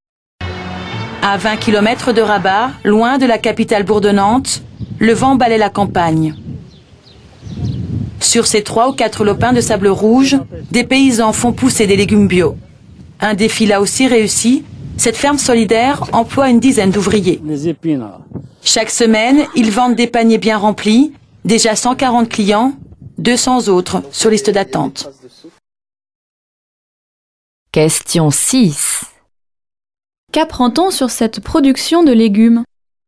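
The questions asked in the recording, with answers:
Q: Qu'apprend-on sur cette production de légumes?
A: Elle a du succès : 140 clients et 200 sur liste d'attente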